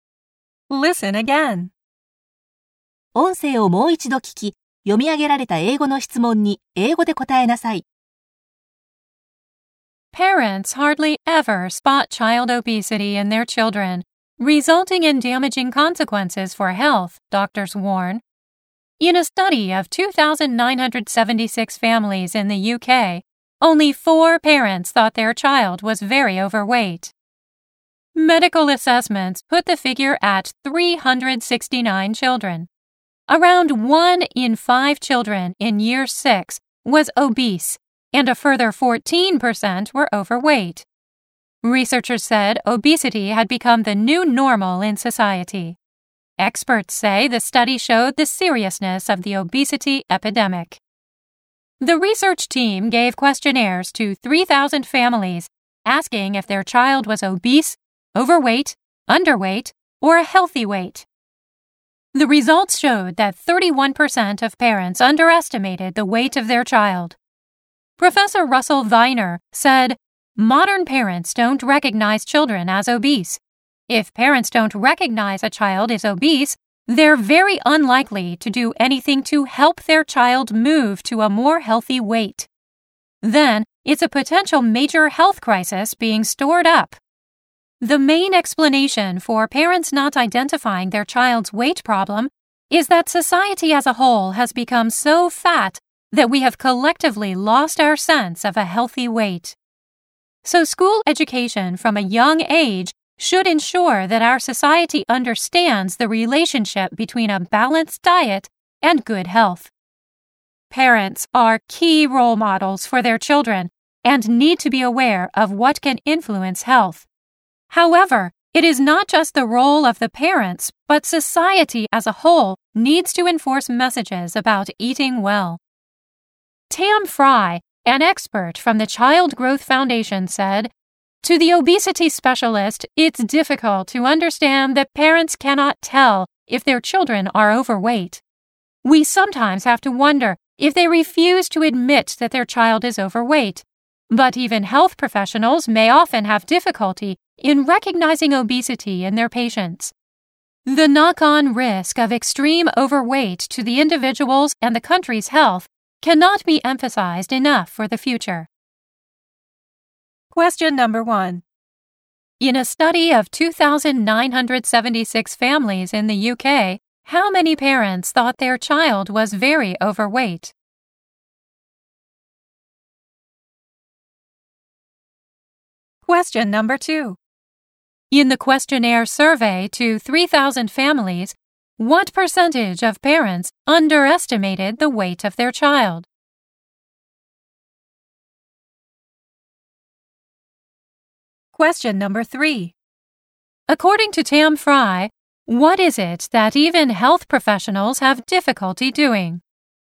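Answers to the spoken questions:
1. Only 4
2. 31%
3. Recognizing obesity in their patients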